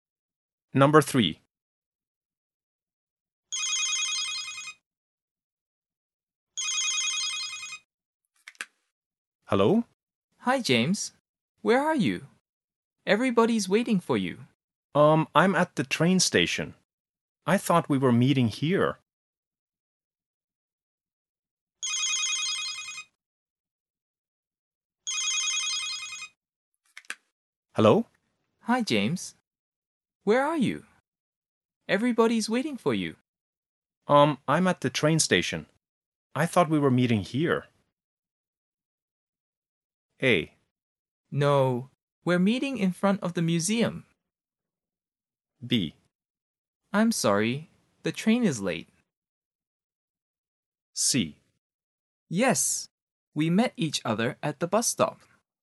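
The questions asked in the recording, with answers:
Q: I thought we were meeting here.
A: A: No, we're meeting in front of the museum.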